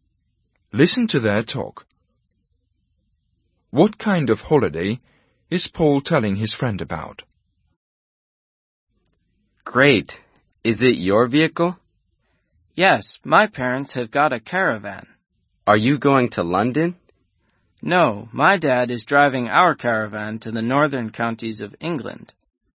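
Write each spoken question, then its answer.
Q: What kind of holiday is Paul telling his friend about?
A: A caravan holiday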